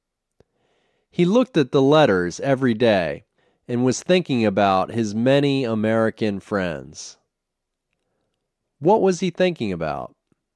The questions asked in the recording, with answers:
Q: What was he thinking about?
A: He was thinking about his many American friends.